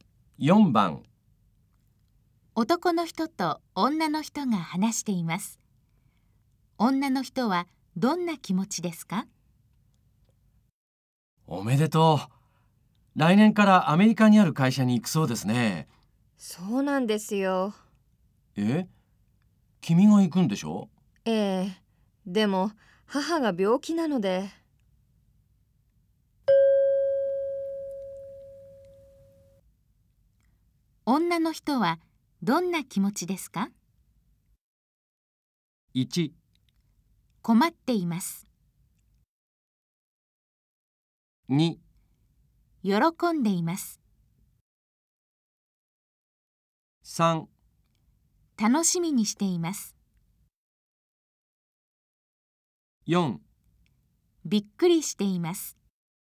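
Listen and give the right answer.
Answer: 1: 困っています。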